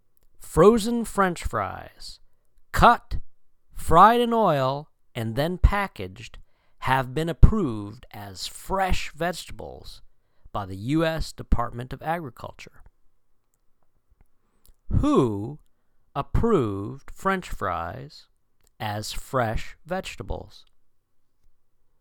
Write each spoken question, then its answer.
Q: Who approved French fries as fresh vegetables?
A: The U.S. Department of Agriculture or the USDA.